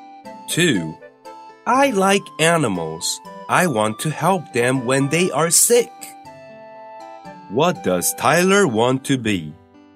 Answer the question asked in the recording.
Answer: He wants to be a vet.